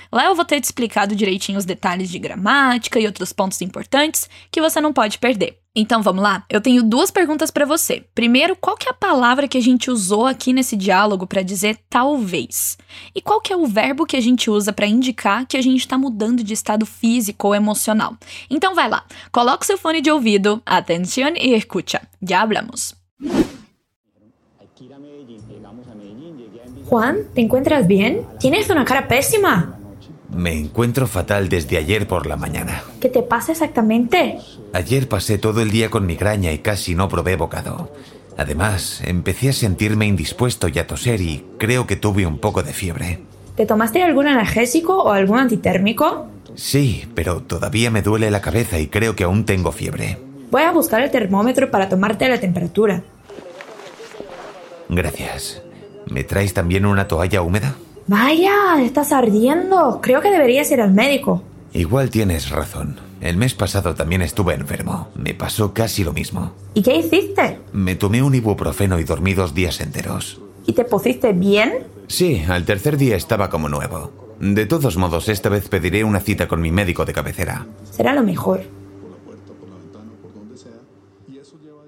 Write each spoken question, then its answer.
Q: Primeiro, qual que é a palavra que a gente usou aqui nesse diálogo para dizer talvez?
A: Igual.

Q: E qual que é o verbo que a gente usa para indicar que a gente está mudando de estado físico ou emocional?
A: Isso, a gente usa o poner para falar que a gente ficou alguma coisa.